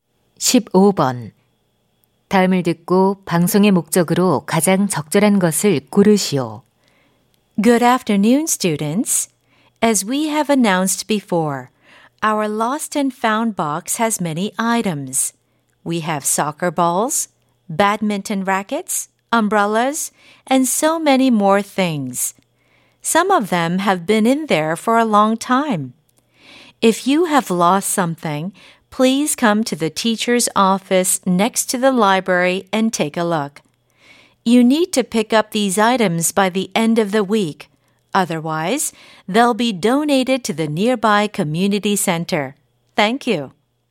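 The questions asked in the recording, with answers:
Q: 다음을 듣고 방송의 목적으로 가장 적절한 것을 고르시오.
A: 분실물을 찾아가도록 안내하려고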